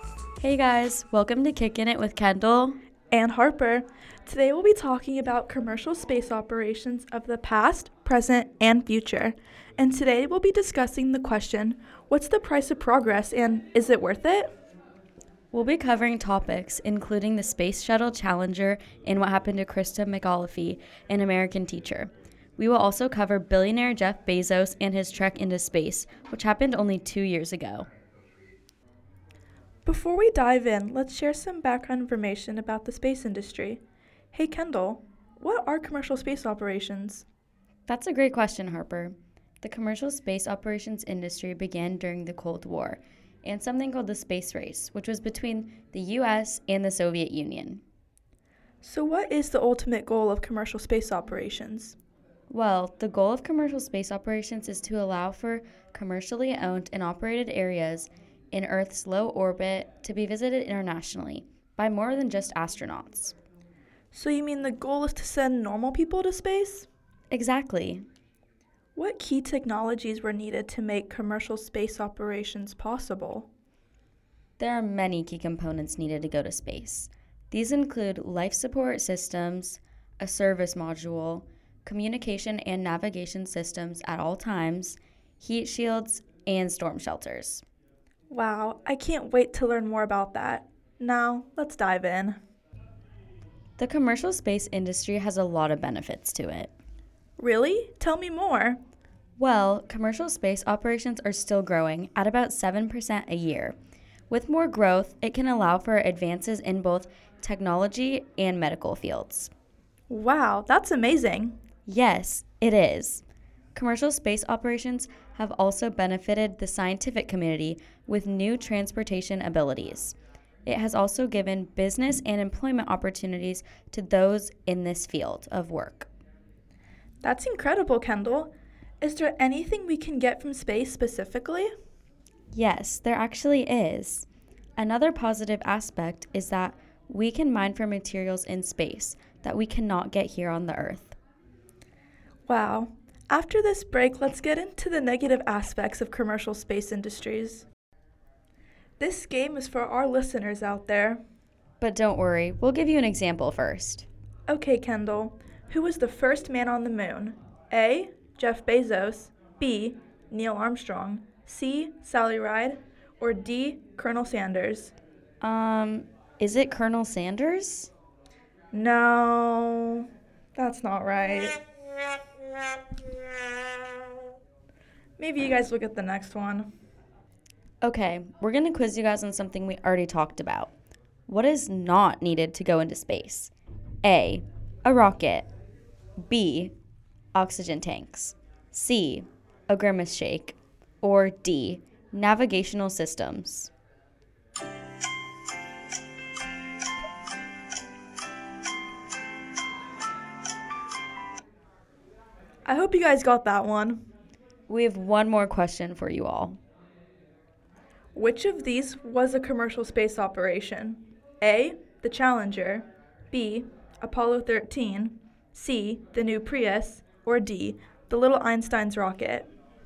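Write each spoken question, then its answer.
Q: What is not needed to go into space?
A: C: A grimace shake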